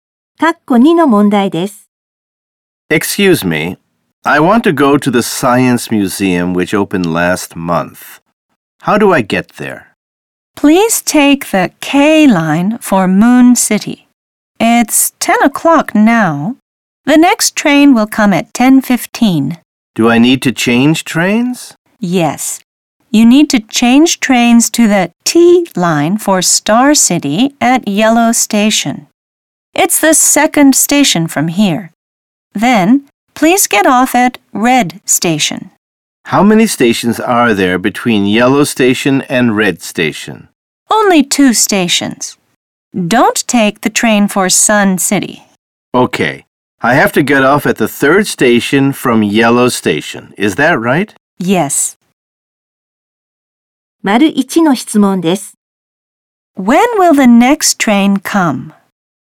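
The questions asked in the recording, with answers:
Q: When will the next train come?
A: At 10:15.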